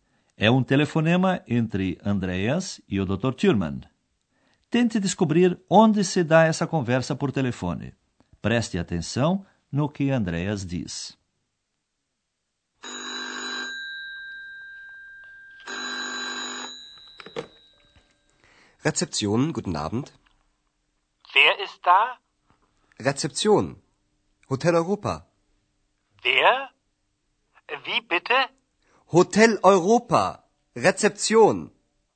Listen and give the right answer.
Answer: A ação do nosso curso transcorre, portanto, no Hotel Europa.